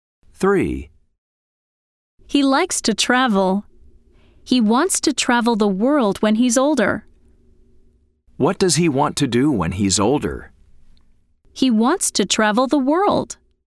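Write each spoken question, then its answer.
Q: What does he want to do when he's older?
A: True: He wants to travel the world.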